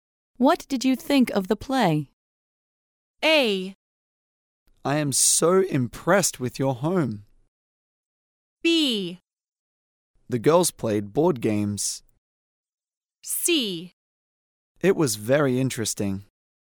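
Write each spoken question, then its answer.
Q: What did you think of the play?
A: C: It was very interesting.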